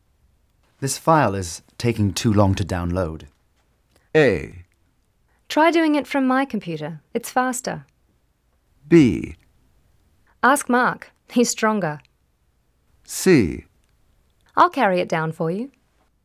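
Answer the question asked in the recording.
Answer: A: Try doing it from my computer. It's faster.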